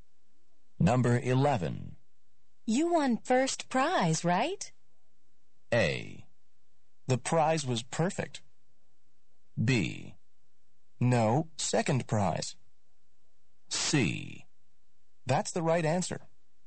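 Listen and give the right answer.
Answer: B: No, second prize.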